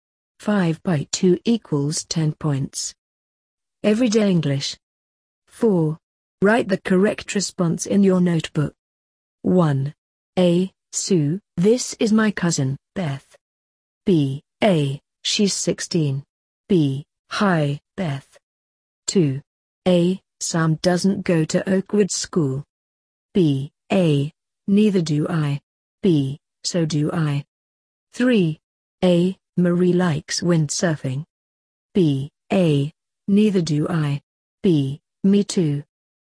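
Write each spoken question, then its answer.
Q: A. Sue, this is my cousin, Beth.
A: B: Hi, Beth.

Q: A. Sam doesn't go to Oakwood School.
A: A: Neither do I.

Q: A. Marie likes windsurfing.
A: B: Me too.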